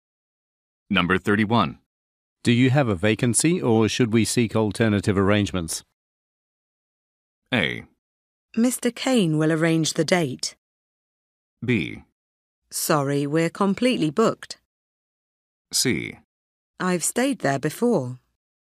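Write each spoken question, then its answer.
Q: Do you have a vacancy or should we seek alternative arrangements?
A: B: Sorry, we're completely booked.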